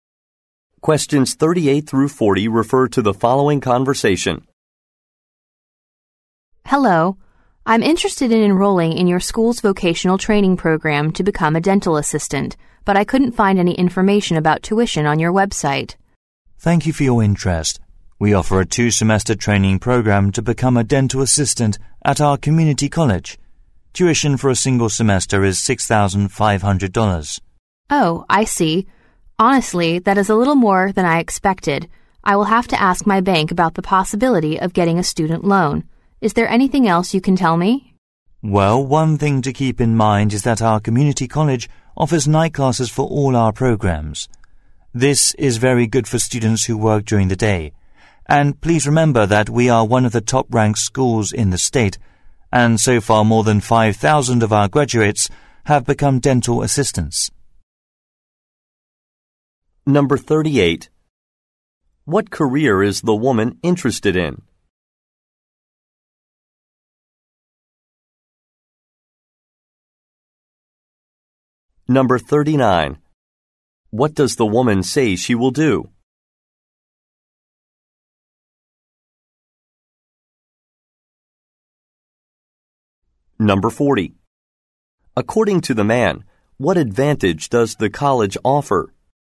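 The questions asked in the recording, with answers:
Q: What career is the woman interested in?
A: Dental assistant

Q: What does the woman say she will do?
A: Ask her bank about a student loan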